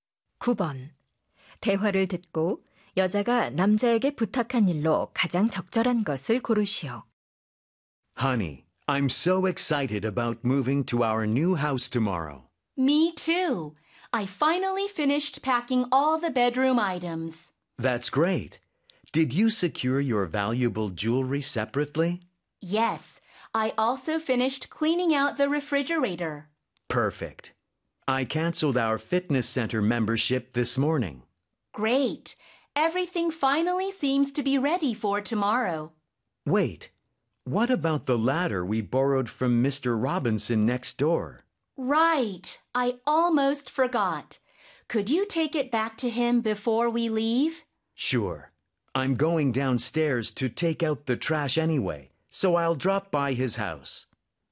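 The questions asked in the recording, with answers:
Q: 대화를 듣고 여자가 남자에게 부탁한 일로 가장 적절한 것을 고르시오.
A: 이웃 Robinson 씨에게 빌린 사다리 돌려주기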